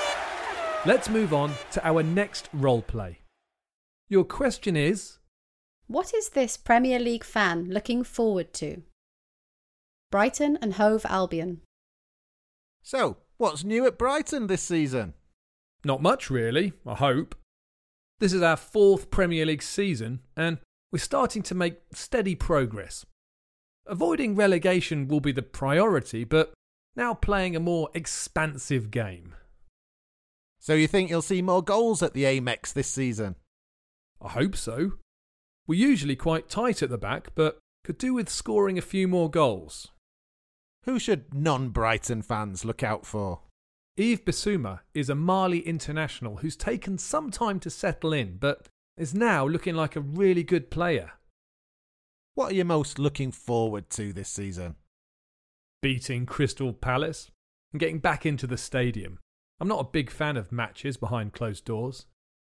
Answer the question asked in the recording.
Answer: He said beating Crystal Palace, because Palace are Brighton's main rivals and also watching matches at stadiums.